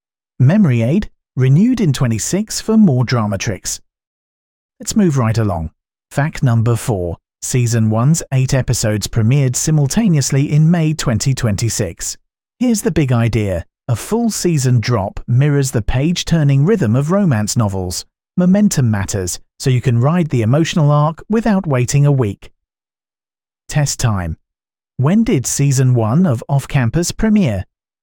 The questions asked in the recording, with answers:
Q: When did Season 1 of Off Campus premiere?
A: May 2026.